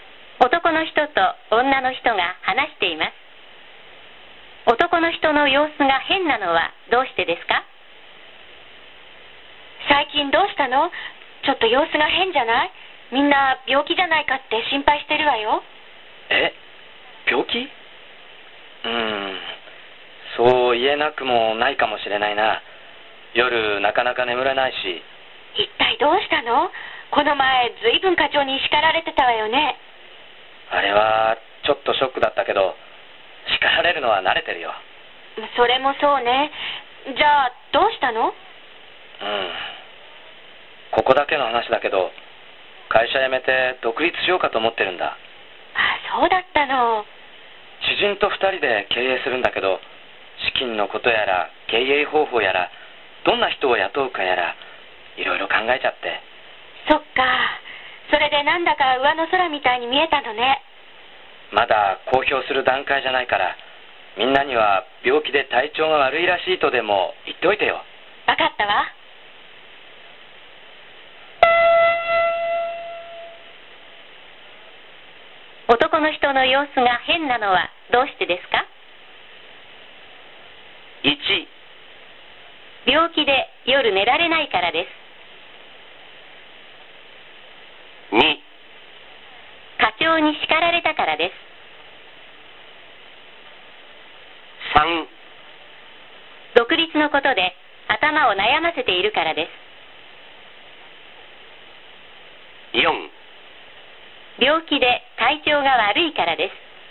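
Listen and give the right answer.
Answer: 3: 独立のことで頭を悩ませているからです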